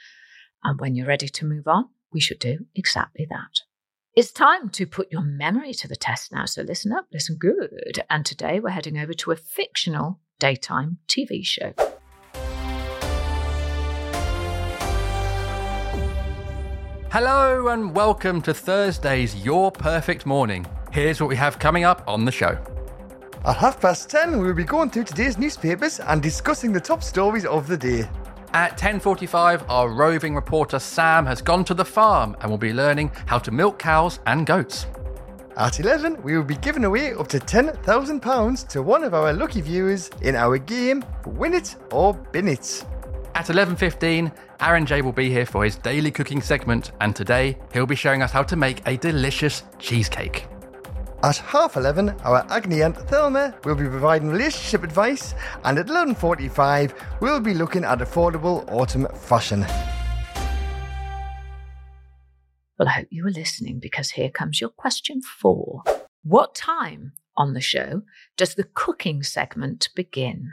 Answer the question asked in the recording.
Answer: Well, the cooking began at 11:15.